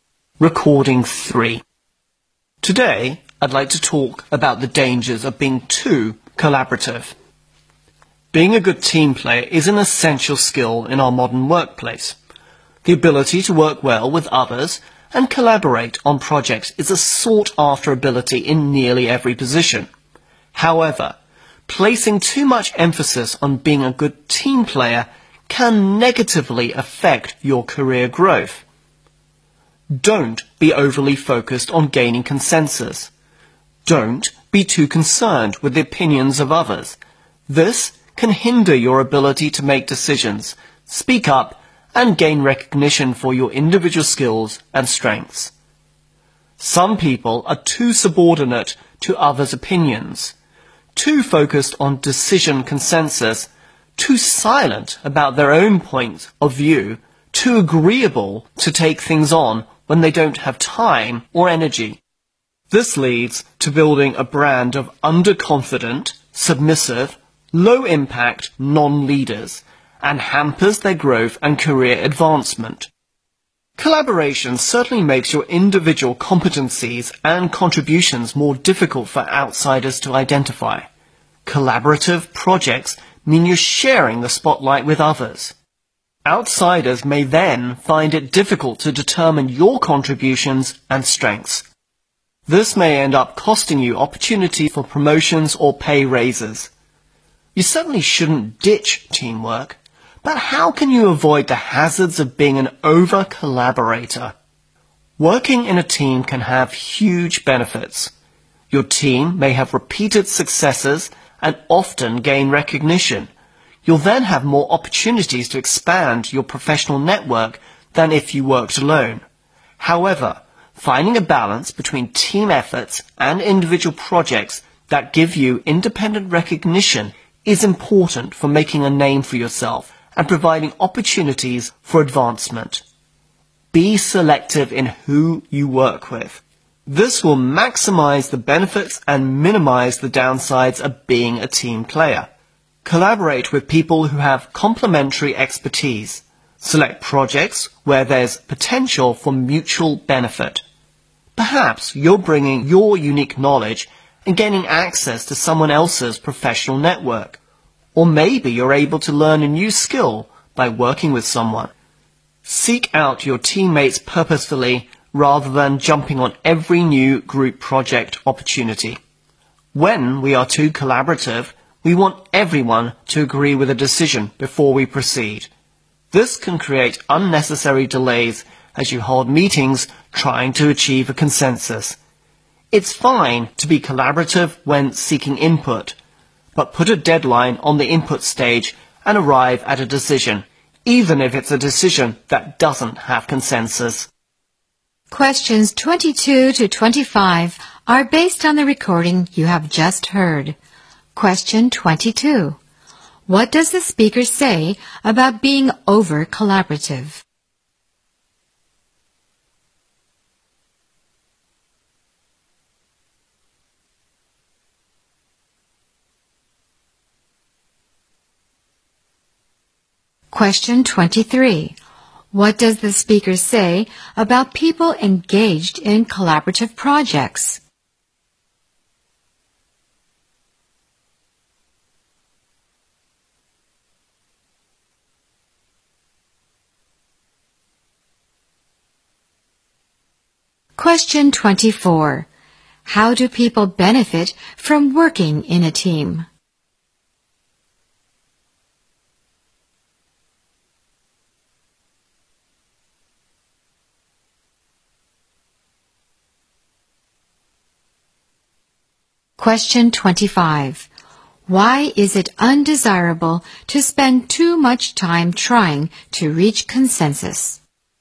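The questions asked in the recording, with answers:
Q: What does the speaker say about being over-collaborative?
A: It can negatively affect your career growth

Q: What does the speaker say about people engaged in collaborative projects?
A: Their individual contributions are hard for outsiders to identify

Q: How do people benefit from working in a team?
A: More opportunities to expand their professional network

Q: Why is it undesirable to spend too much time trying to reach consensus?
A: It creates unnecessary delays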